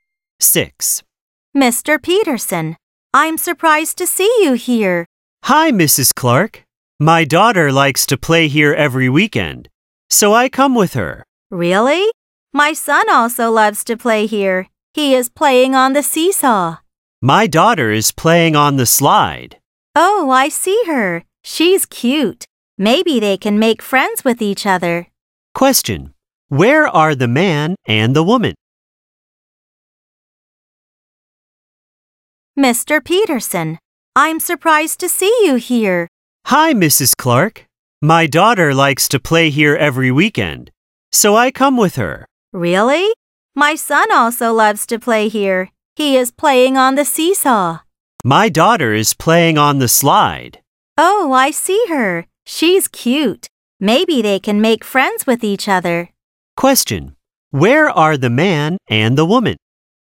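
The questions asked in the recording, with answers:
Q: Where are the man and the woman?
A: At a playground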